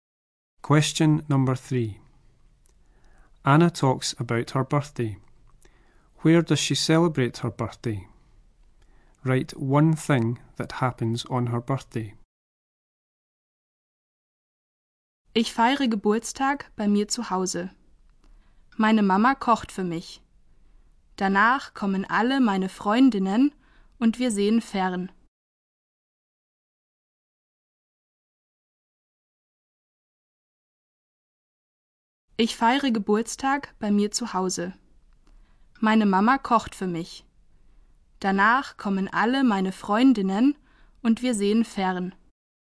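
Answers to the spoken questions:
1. At home
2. Her mum cooks for her / her friends come and they watch TV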